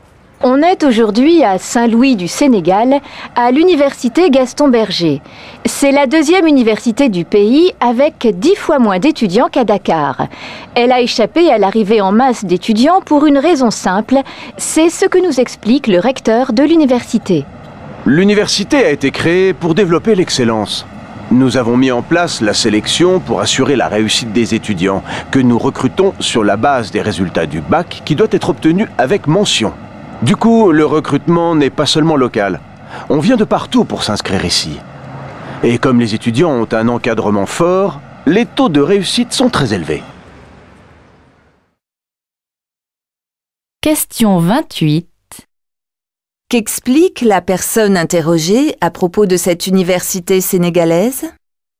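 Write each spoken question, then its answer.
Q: Qu'explique la personne interrogée à propos de cette université sénégalaise ?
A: Elle sélectionne ses étudiants sur les résultats du bac, qui doit être obtenu avec mention, pour développer l'excellence.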